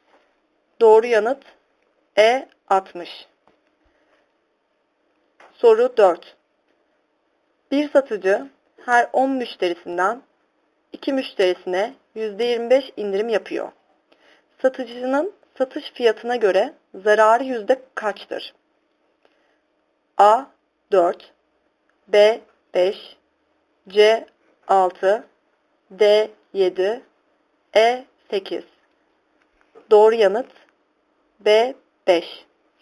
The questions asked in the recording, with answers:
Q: Satıcının satış fiyatına göre zararı yüzde kaçtır?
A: Doğru yanıt B 5.